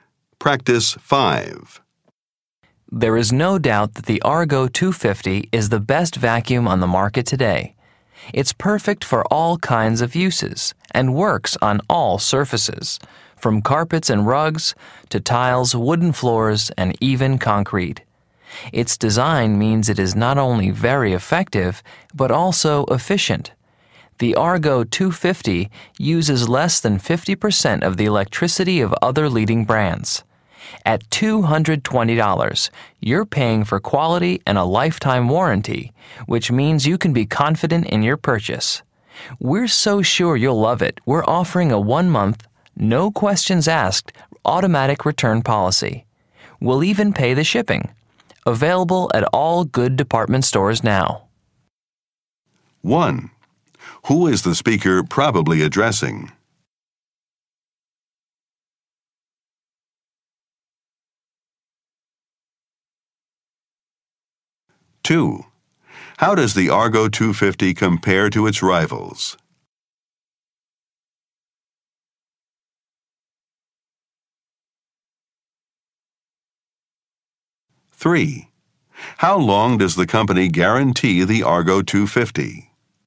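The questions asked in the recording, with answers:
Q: Who is the speaker probably addressing?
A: Potential customers (shoppers looking for a vacuum)

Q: How does the Argo 250 compare to its rivals?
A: It uses less than half the electricity of other leading brands

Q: How long does the company guarantee the Argo 250?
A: For a lifetime (lifetime warranty)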